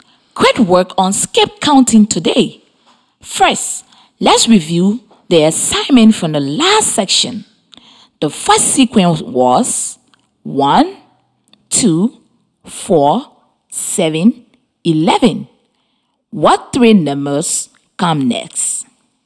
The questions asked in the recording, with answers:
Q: What three numbers come next?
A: The next three numbers are 16, 22, and